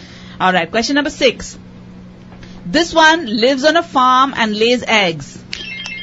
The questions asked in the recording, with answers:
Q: This one lives on a farm and lays eggs.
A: Hen.